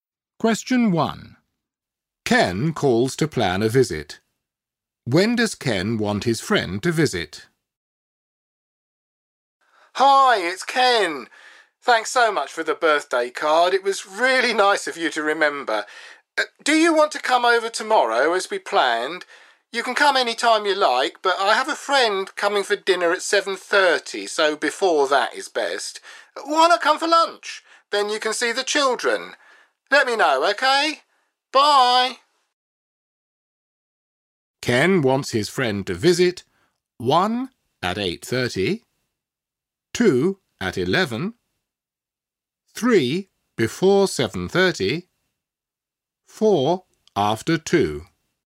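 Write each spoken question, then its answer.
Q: When does Ken want his friend to visit?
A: 3: before 7:30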